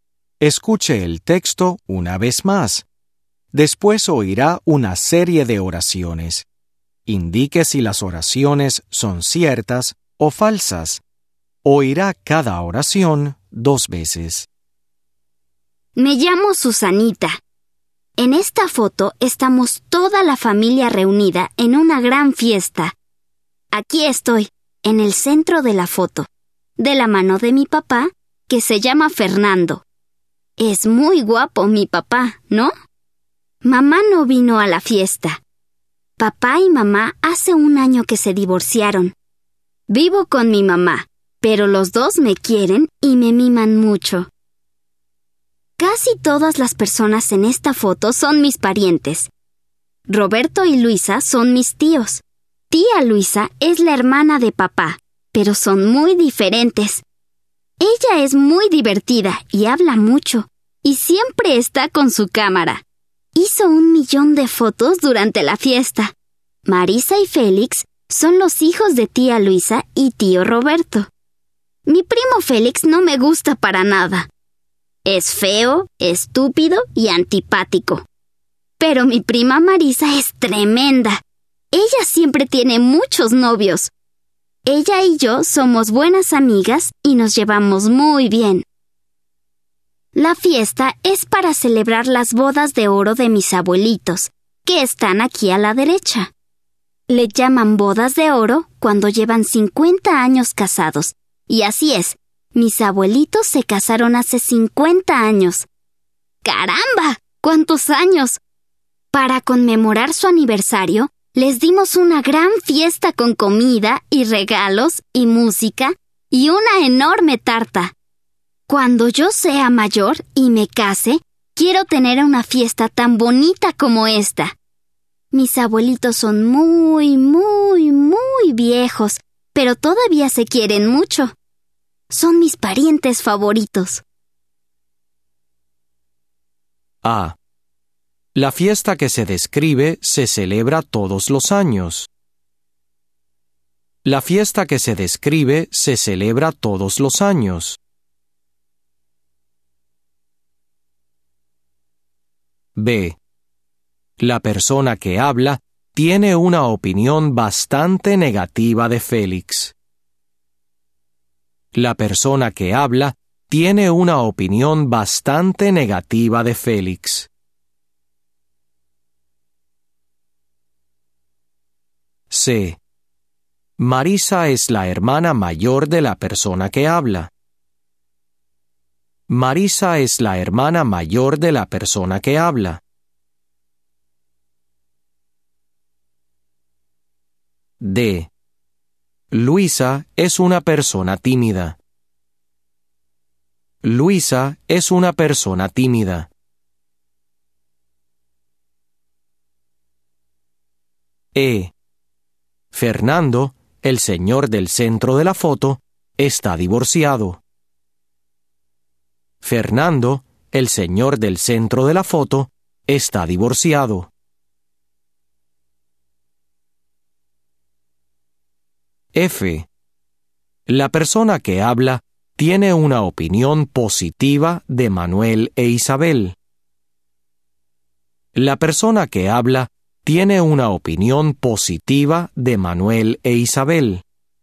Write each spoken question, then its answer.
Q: La fiesta que se describe se celebra todos los años.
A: Falso.

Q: La persona que habla tiene una opinión bastante negativa de Félix.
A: Cierto.

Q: Marisa es la hermana mayor de la persona que habla.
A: Falso.

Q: Luisa es una persona tímida.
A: Falso.

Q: Fernando, el señor del centro de la foto, está divorciado.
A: Cierto.